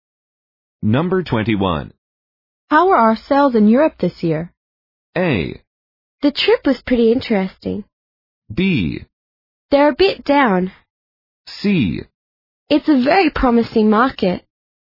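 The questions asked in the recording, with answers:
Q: How are our sales in Europe this year?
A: B: They're a bit down.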